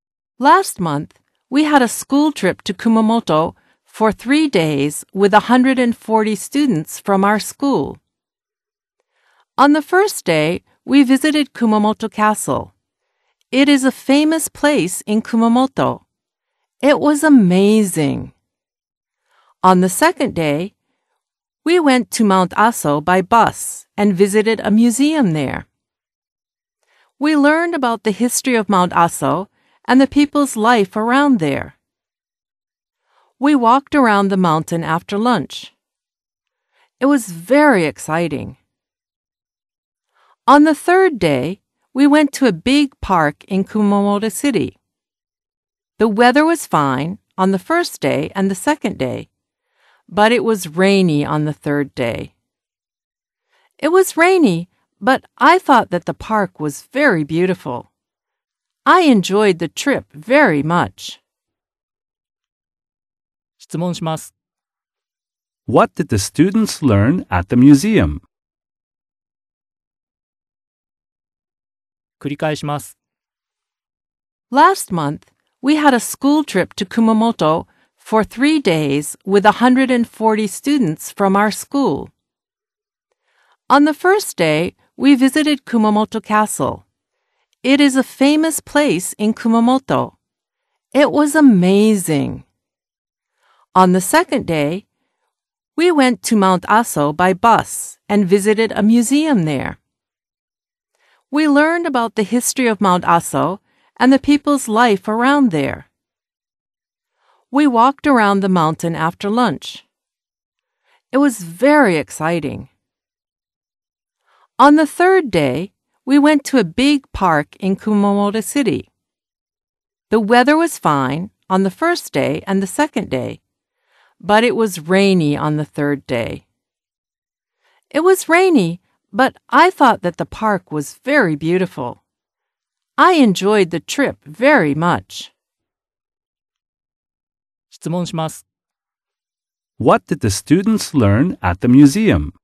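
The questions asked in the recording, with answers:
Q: What did the students learn at the museum?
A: They learned about the history of Mount Aso and the people's life around there.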